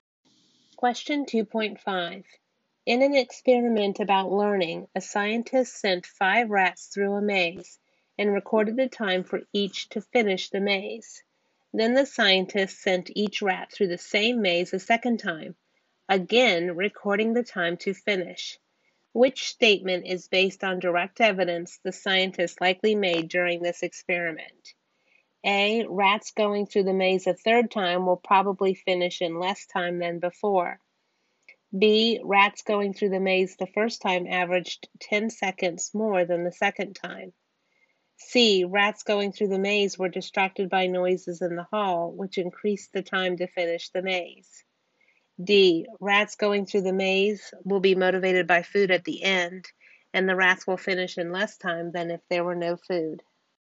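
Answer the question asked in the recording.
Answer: B: Rats going through the maze the first time averaged 10 seconds more than the second time.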